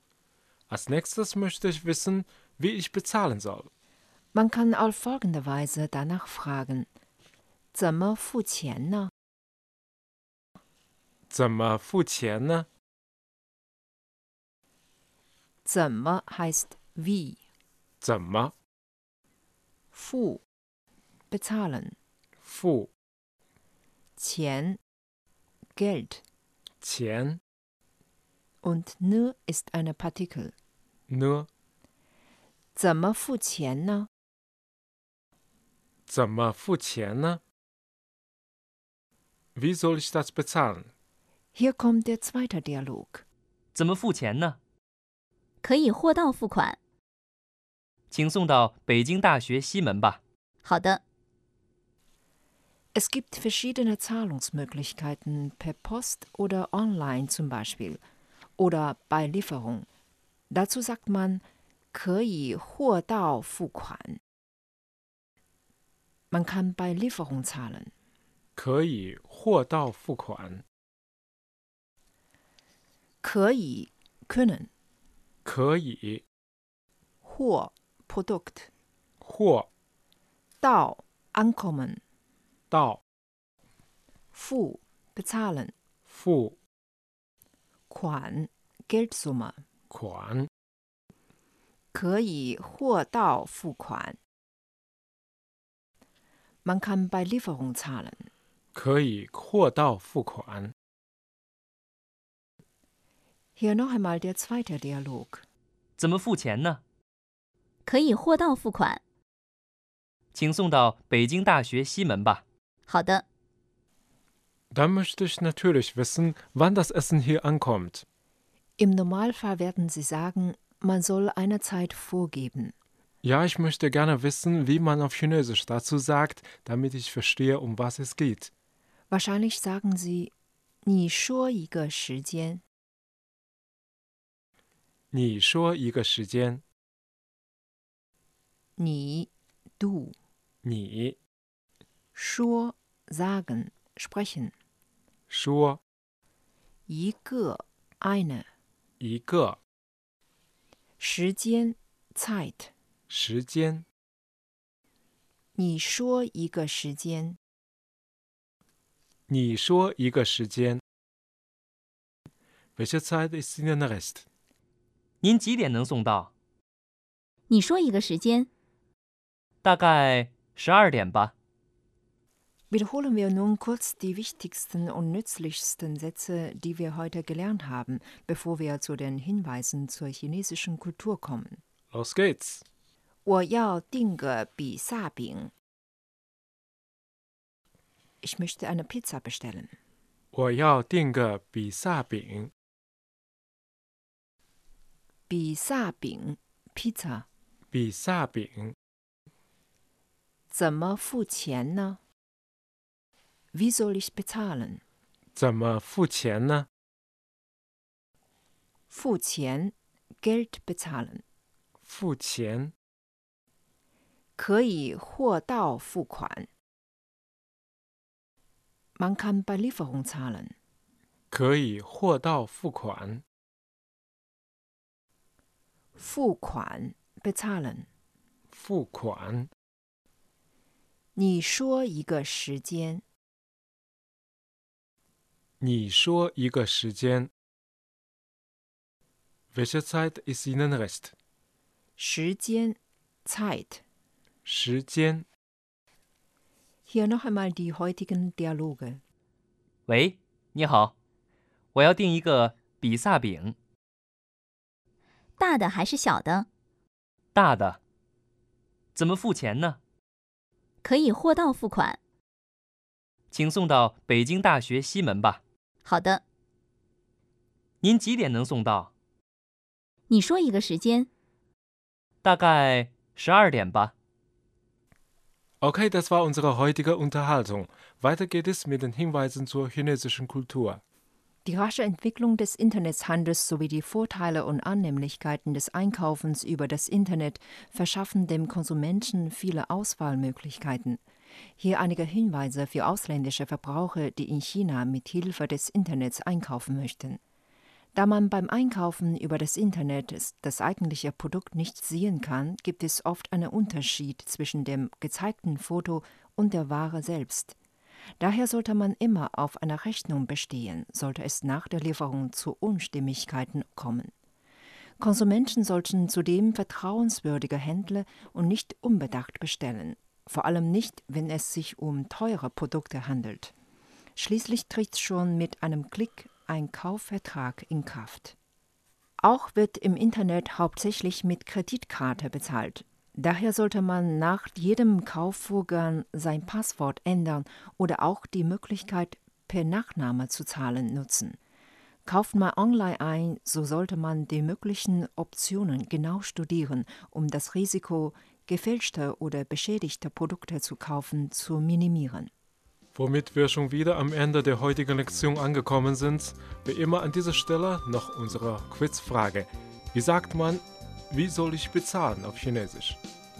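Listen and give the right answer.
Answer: 怎么付钱呢?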